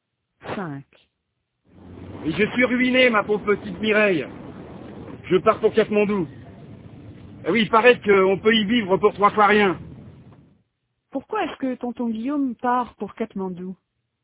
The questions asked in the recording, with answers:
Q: Pourquoi est-ce que tonton Guillaume part pour Katmandou?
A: Parce qu'il est ruiné et que là-bas, on peut vivre pour 3 fois rien.